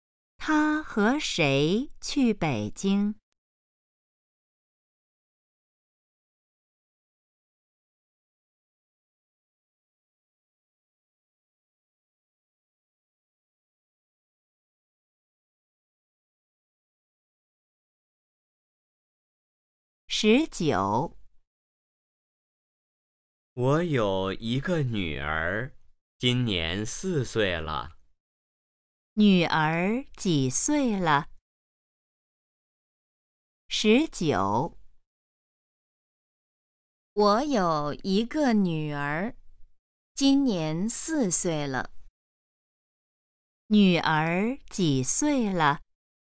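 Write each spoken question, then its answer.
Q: 女儿几岁了?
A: 4岁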